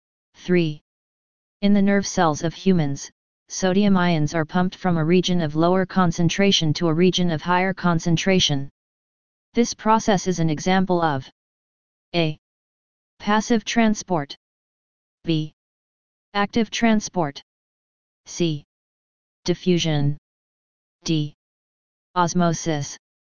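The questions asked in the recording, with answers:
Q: In the nerve cells of humans, sodium ions are pumped from a region of lower concentration to a region of higher concentration. This process is an example of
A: B: Active transport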